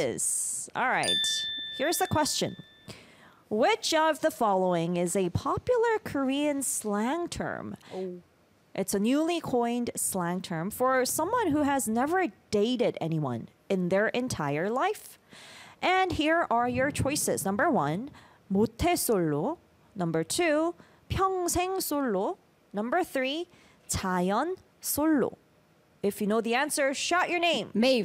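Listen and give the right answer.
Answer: 1: 모태 솔로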